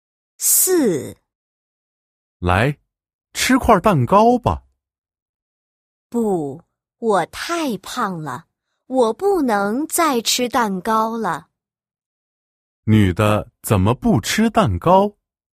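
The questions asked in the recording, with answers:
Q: 女的怎么不吃蛋糕?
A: 她太胖了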